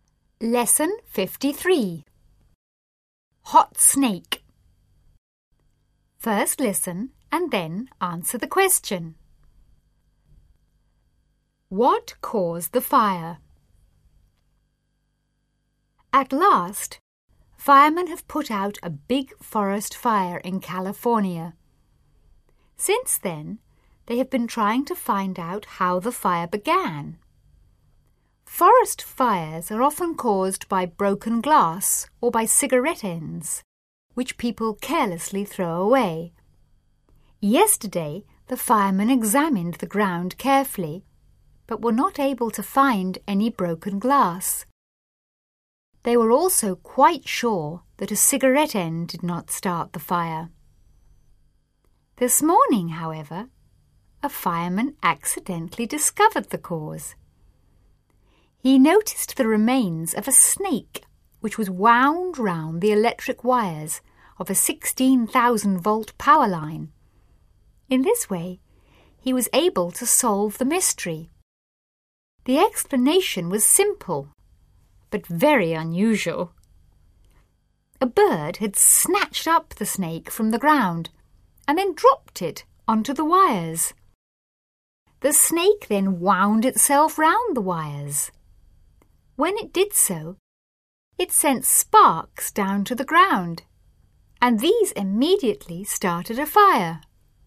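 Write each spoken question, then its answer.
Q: What caused the fire?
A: A snake dropped by a bird onto electric power wires, which sent sparks to the ground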